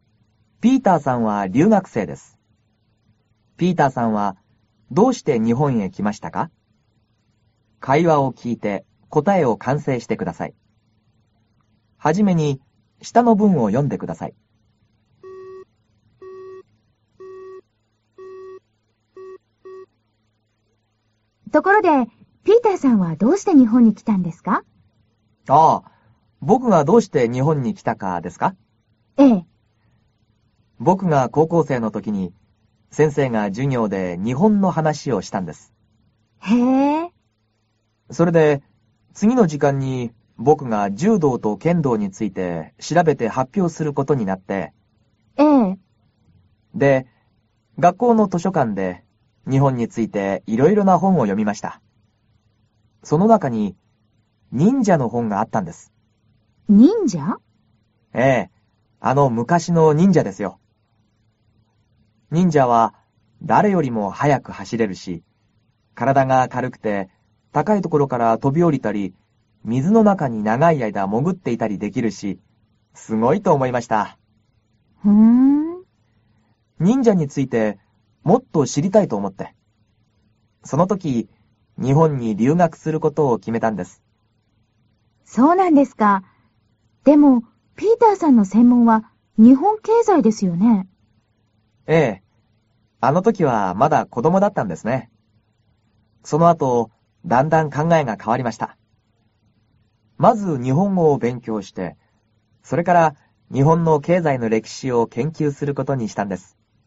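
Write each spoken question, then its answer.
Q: ピーターさんはどうして日本へ来ましたか?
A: 高校生の時に忍者の本を読んで、忍者についてもっと知りたいと思ったから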